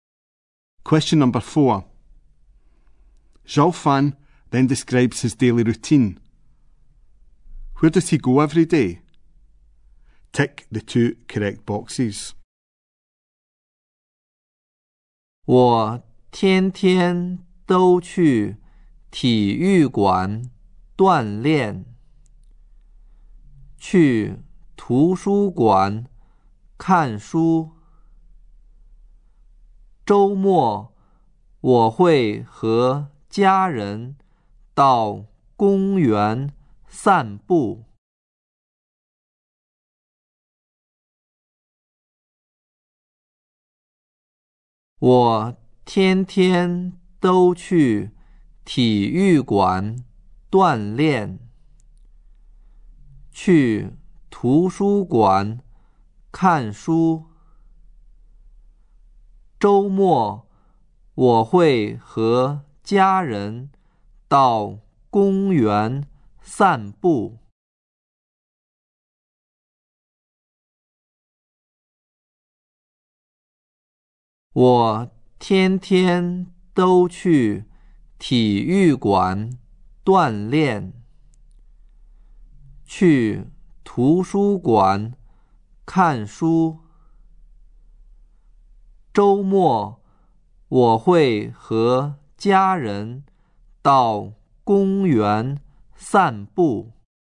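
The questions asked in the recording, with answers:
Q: Where does he go every day?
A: The gym and the library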